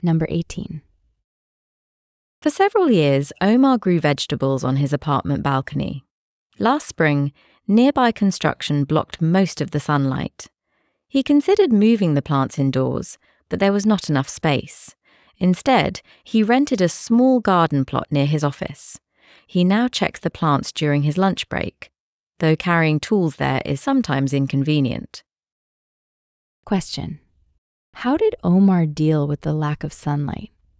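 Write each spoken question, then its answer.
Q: How did Omar deal with the lack of sunlight?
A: He rented a small garden plot near his office.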